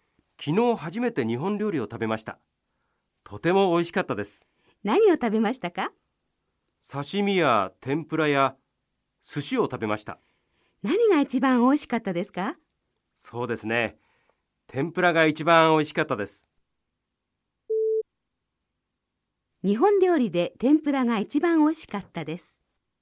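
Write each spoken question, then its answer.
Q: 日本料理で天ぷらが一番美味しかったです。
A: ○(正しい)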